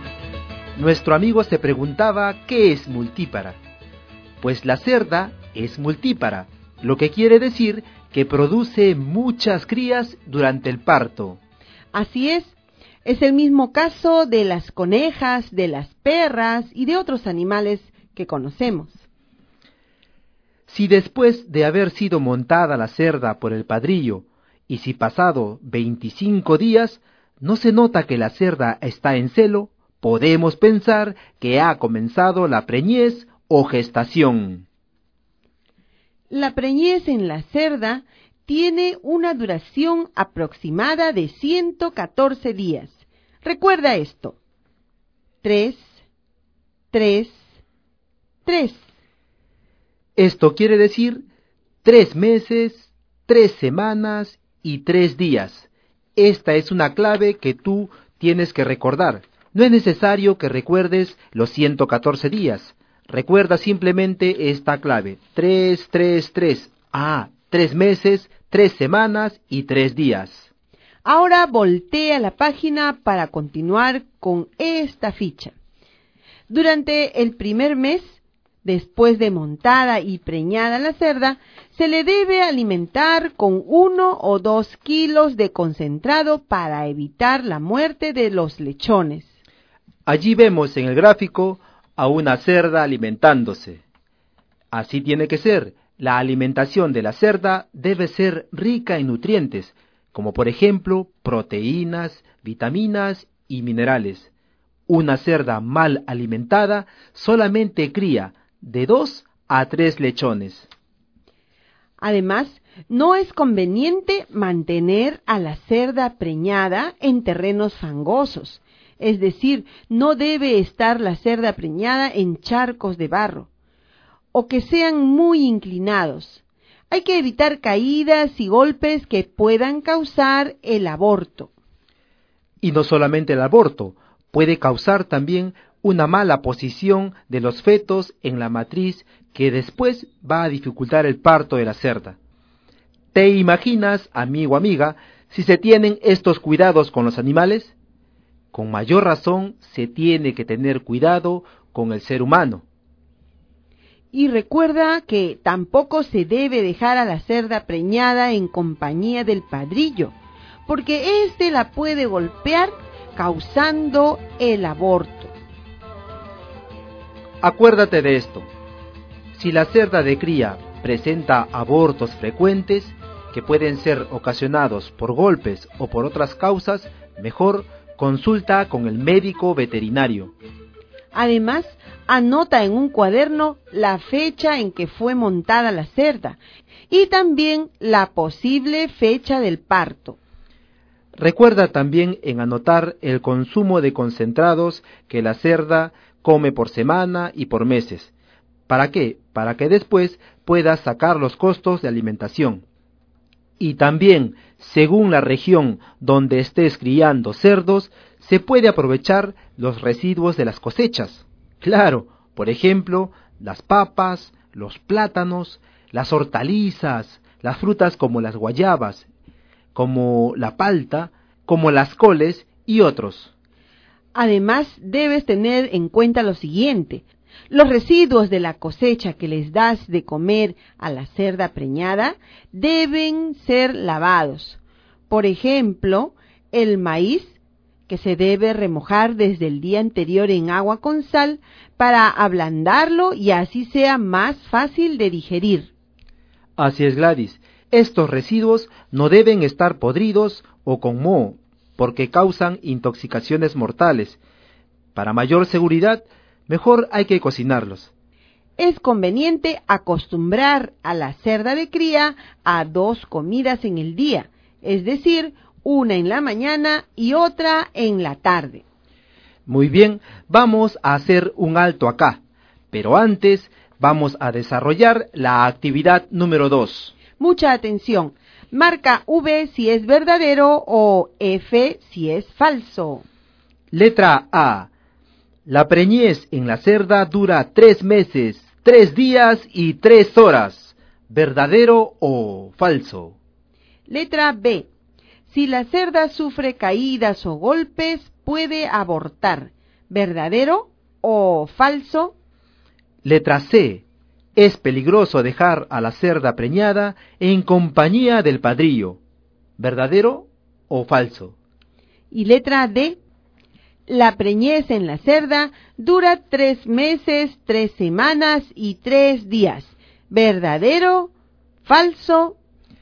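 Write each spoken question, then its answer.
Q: Letra A. La preñez en la cerda dura 3 meses, 3 días y 3 horas. ¿Verdadero o falso?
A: Falso

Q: Letra B. Si la cerda sufre caídas o golpes, puede abortar. ¿Verdadero o falso?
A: Verdadero

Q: Letra C. Es peligroso dejar a la cerda preñada en compañía del padrillo. ¿Verdadero o falso?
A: Verdadero

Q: Y letra D. La preñez en la cerda dura 3 meses, 3 semanas y 3 días. ¿Verdadero, falso?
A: Verdadero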